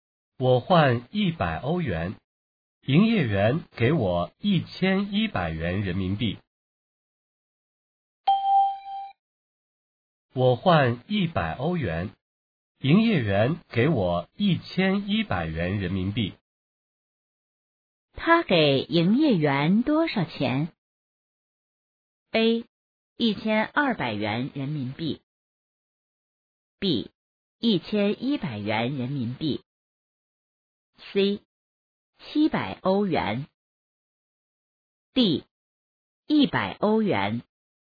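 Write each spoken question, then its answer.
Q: 他给营业员多少钱?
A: D: 100欧元。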